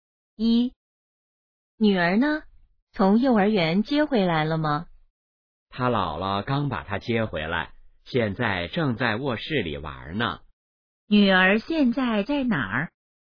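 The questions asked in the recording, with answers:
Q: 女儿现在在哪儿?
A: 在卧室里玩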